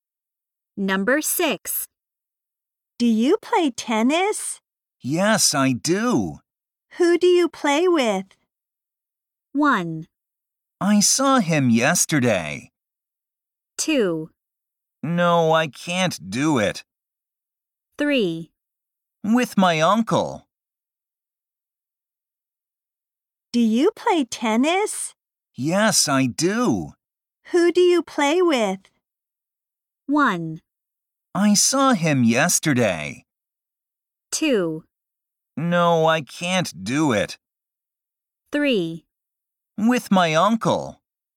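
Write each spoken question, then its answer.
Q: Who do you play with?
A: 3: With my uncle.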